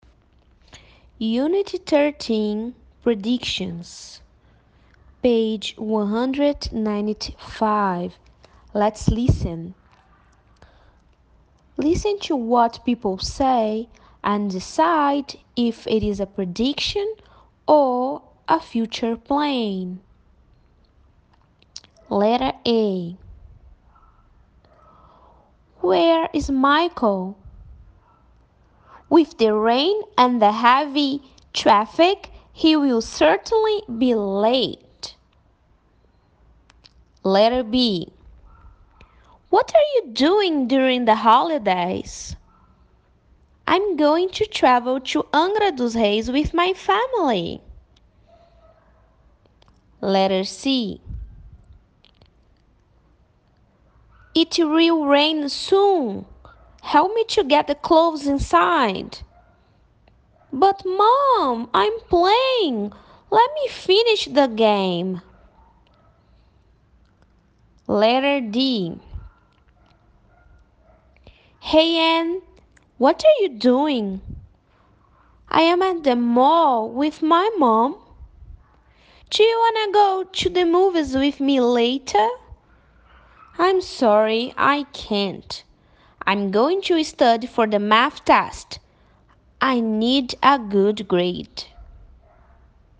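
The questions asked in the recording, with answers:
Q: Listen to what people say and decide if it is a prediction or a future plan.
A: prediction

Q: Listen to what people say and decide if it is a prediction or a future plan.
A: future plan

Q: Listen to what people say and decide if it is a prediction or a future plan.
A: prediction

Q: Listen to what people say and decide if it is a prediction or a future plan.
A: future plan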